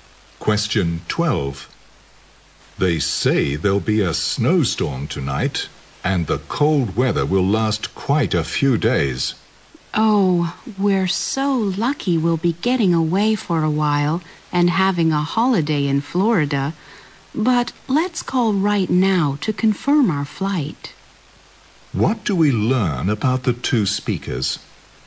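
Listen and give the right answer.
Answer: They are going on holiday to Florida and will fly there.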